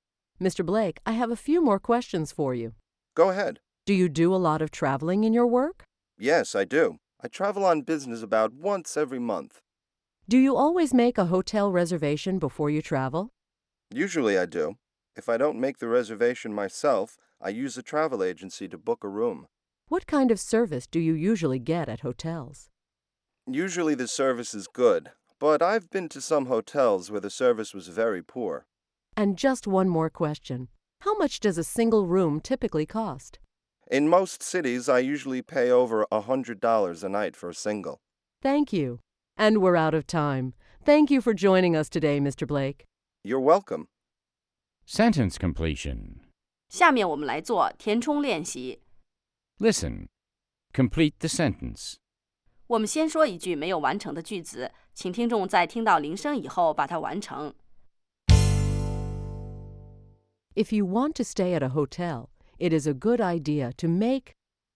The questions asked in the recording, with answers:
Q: If you want to stay at a hotel, it is a good idea to make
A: a reservation. It's a good idea to make a reservation.